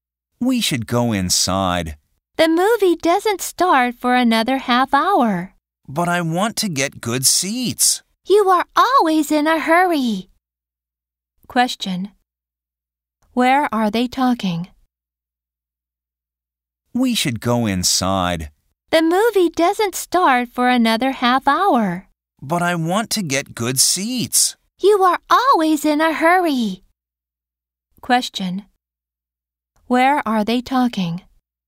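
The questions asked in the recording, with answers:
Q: Where are they talking?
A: At a movie theater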